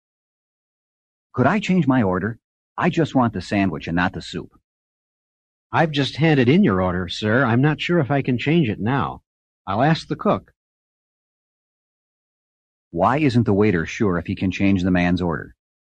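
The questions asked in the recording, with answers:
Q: Why isn't the waiter sure if he can change the man's order?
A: He has already handed in the order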